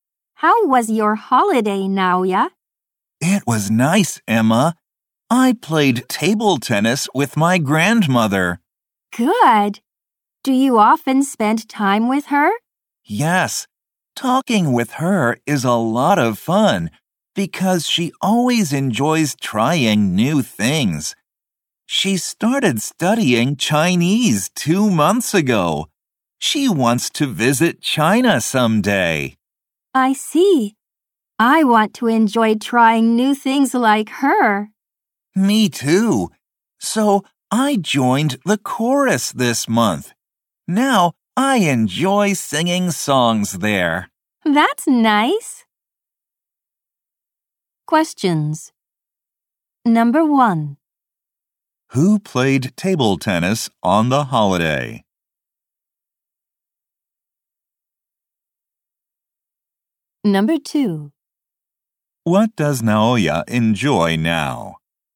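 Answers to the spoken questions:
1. Naoya and his grandmother.
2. Singing songs in the chorus.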